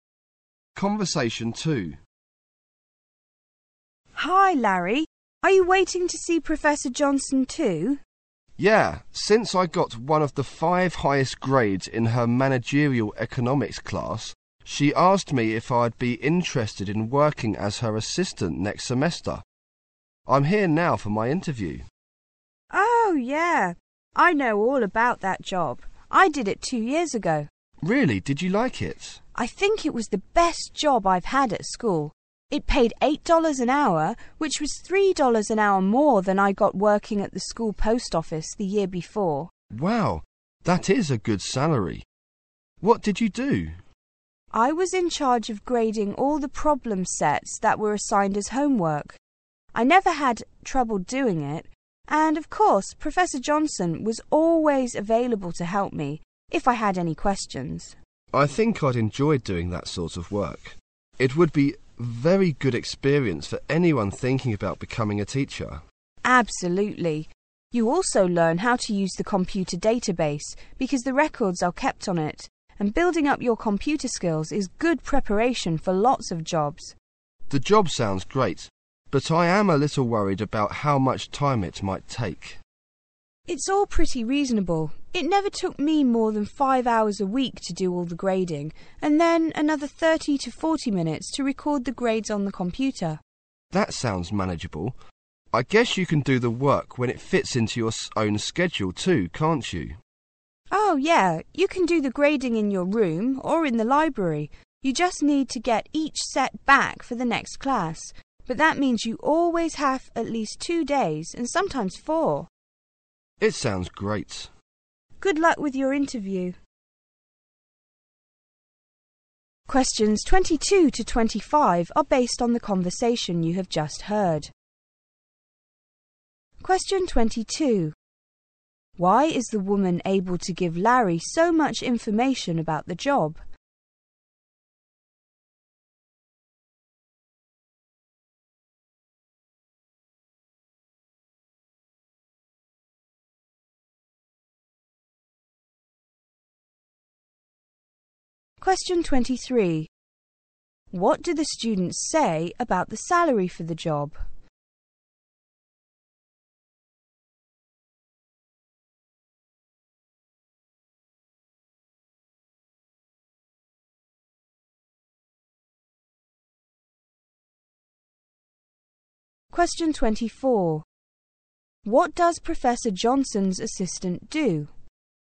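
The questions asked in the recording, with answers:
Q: Why is the woman able to give Larry so much information about the job?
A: She did the job 2 years ago

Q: What do the students say about the salary for the job?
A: It is good: $8 an hour, more than the post office job

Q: What does Professor Johnson's assistant do?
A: Grades problem sets and records grades on the computer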